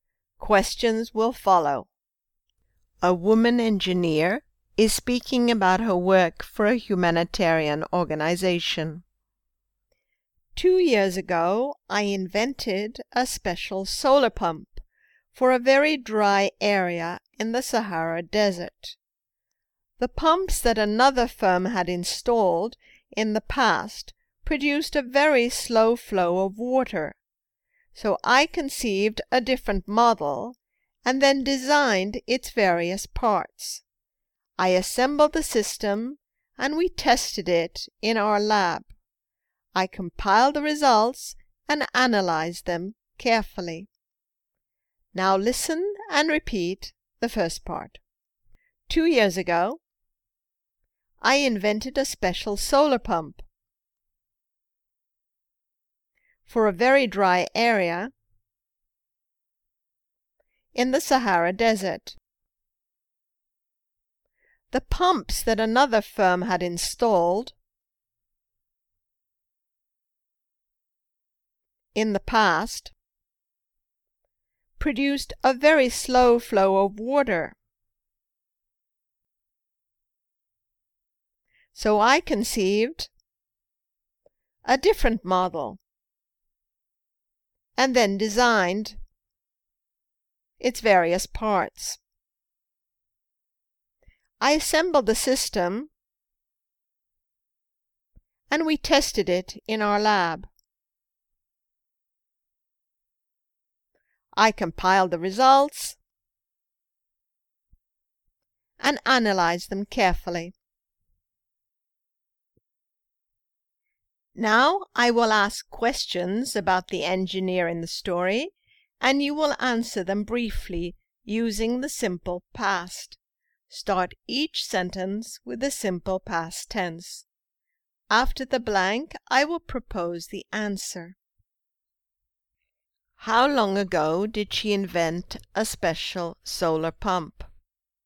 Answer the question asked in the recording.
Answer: She invented it 2 years ago.